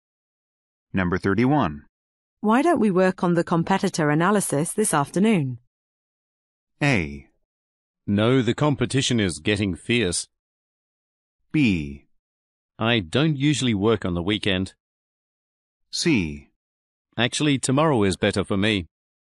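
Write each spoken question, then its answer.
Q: Why don't we work on the competitor analysis this afternoon?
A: C: Actually, tomorrow is better for me.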